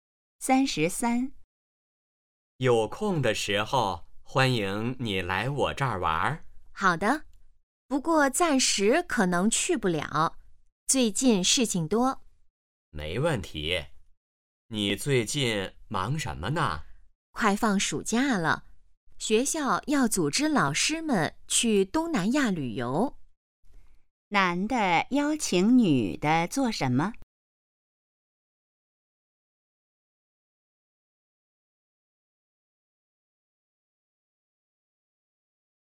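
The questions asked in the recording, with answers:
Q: 男的邀请女的做什么?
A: 来他那儿玩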